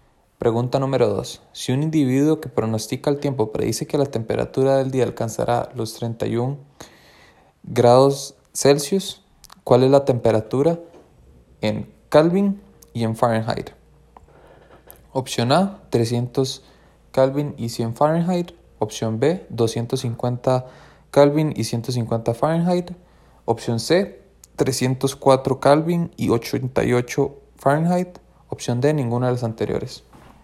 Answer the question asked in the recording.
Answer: La opción correcta es la opción C.